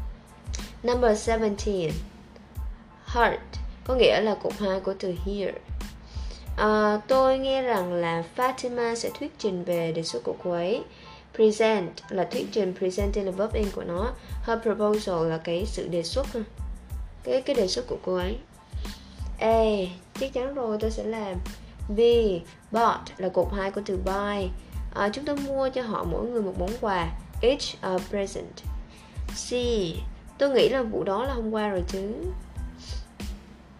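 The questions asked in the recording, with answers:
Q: Tôi nghe rằng là Fatima sẽ thuyết trình về đề xuất của cô ấy.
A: C: Tôi nghĩ là vụ đó là hôm qua rồi chứ.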